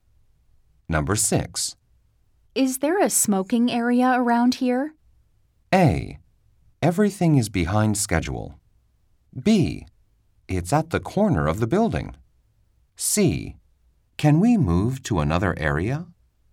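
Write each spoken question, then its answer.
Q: Is there a smoking area around here?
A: B: It's at the corner of the building.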